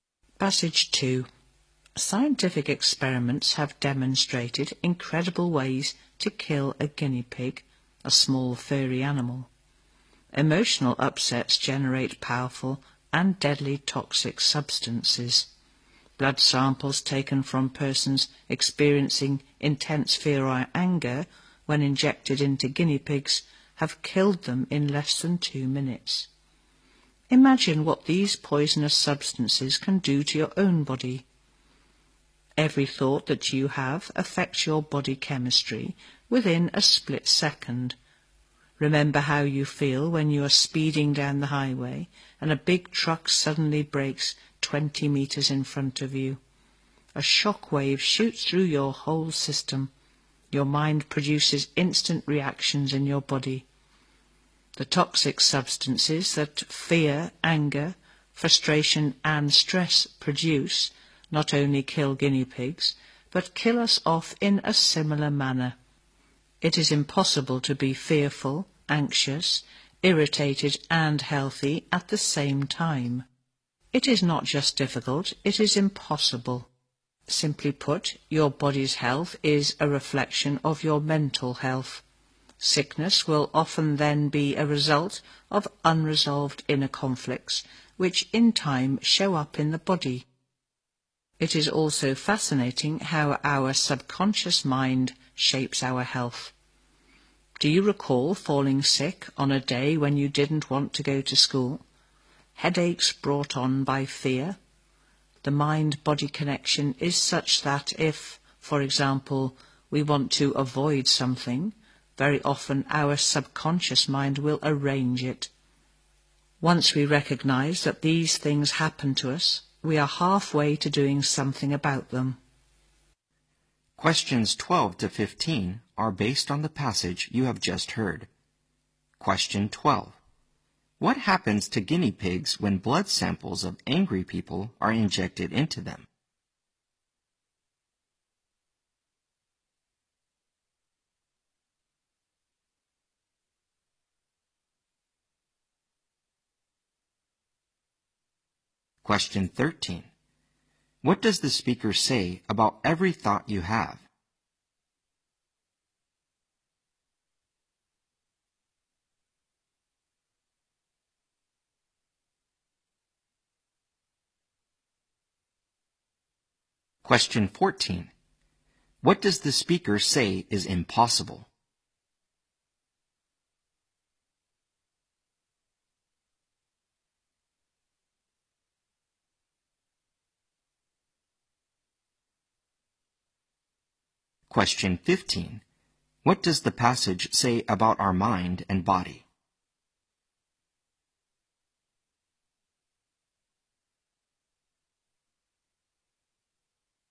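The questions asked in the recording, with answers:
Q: What happens to guinea pigs when blood samples of angry people are injected into them?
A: They die in less than 2 minutes

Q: What does the speaker say about every thought you have?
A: It affects your body chemistry within a split second

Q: What does the speaker say is impossible?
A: To be fearful, anxious, irritated and healthy at the same time

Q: What does the passage say about our mind and body?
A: The body's health reflects mental health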